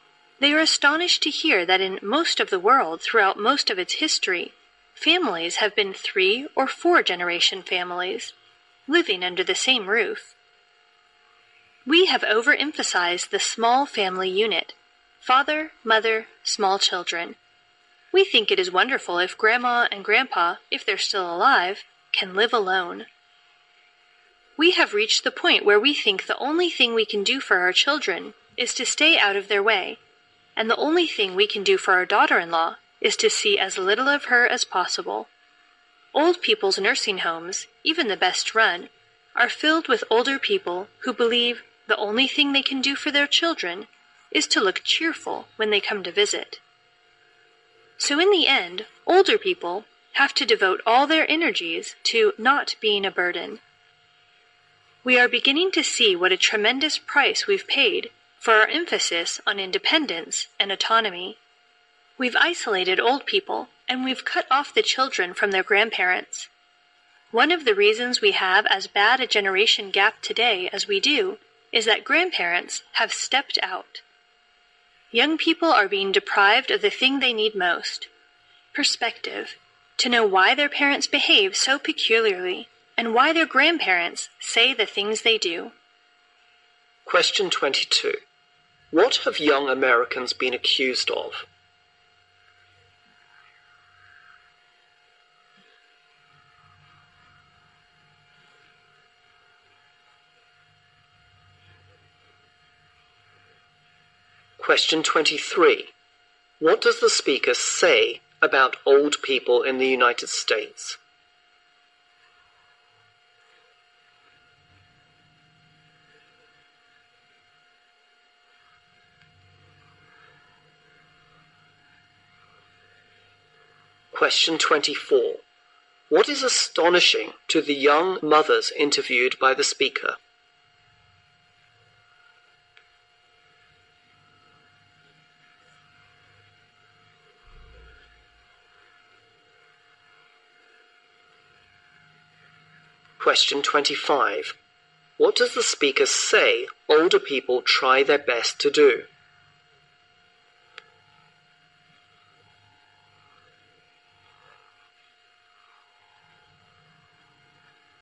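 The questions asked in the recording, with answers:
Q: What is astonishing to the young mothers interviewed by the speaker?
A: That through most of history, in most of the world, families had three or four generations living under the same roof

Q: What does the speaker say older people try their best to do?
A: Not to be a burden to their children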